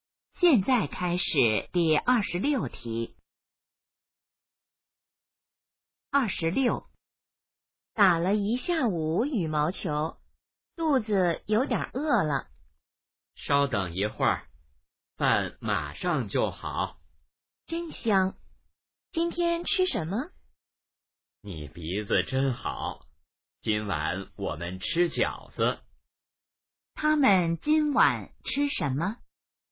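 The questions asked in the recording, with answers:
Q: 他们今晚吃什么?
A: 饺子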